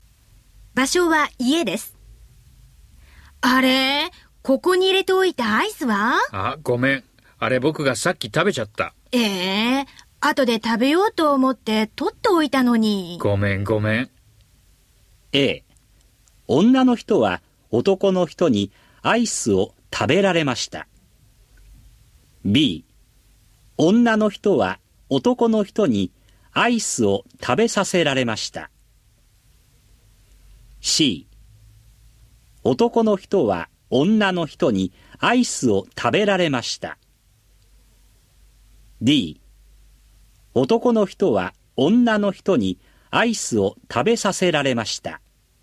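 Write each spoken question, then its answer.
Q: A、 女の人は男の人にアイスを食べられました。 B、 女の人は男の人にアイスを食べさせられました。 C、 男の人は女の人にアイスを食べられました。 D、 男の人は女の人にアイスを食べさせられました。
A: A: 女の人は男の人にアイスを食べられました。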